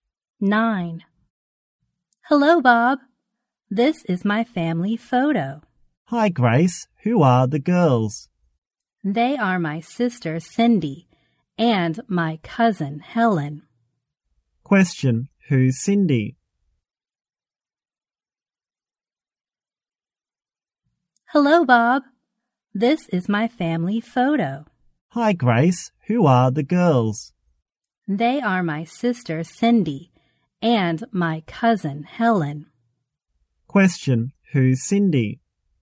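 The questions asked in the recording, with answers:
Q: who's Cindy?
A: Grace's sister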